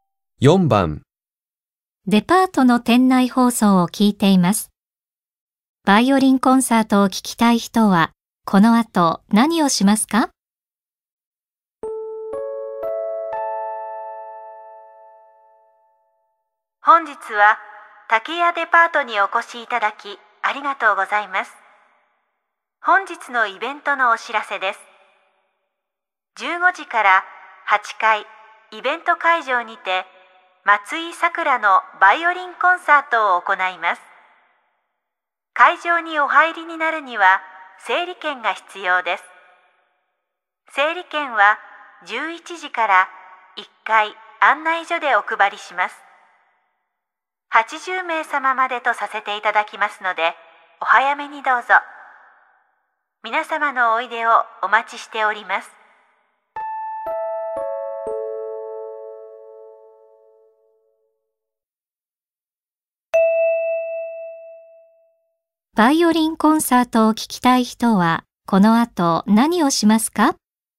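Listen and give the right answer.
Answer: 1階案内所で整理券をもらう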